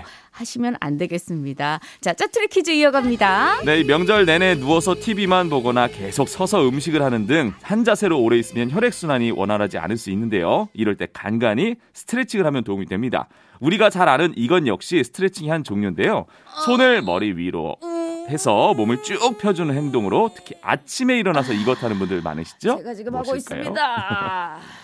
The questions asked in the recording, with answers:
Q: 제가 지금 무엇일까요?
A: 정답은 기지개였습니다.